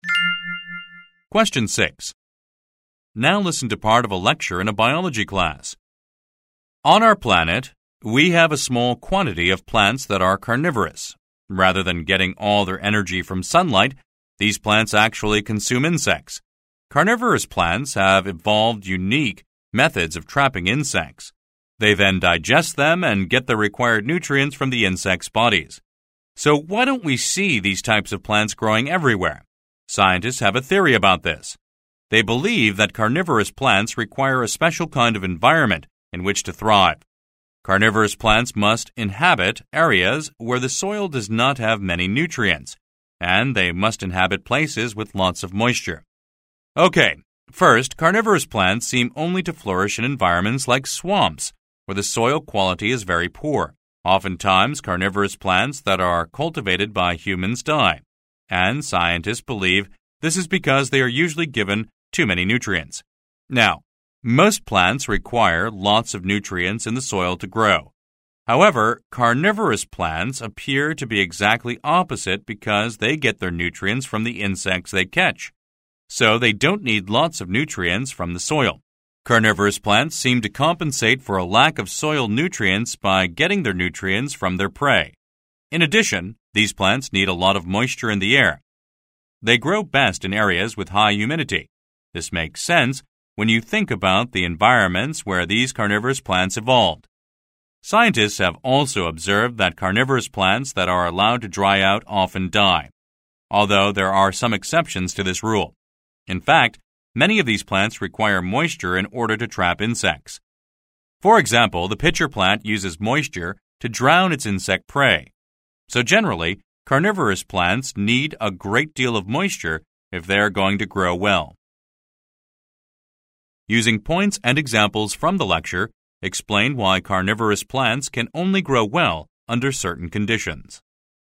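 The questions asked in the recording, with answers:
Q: Using points and examples from the lecture, explain why carnivorous plants can only grow well under certain conditions.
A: They need nutrient-poor soil (they get nutrients from insects, and too many soil nutrients kill them) and lots of moisture/high humidity (they die if dried out; e.g., the pitcher plant uses moisture to drown prey).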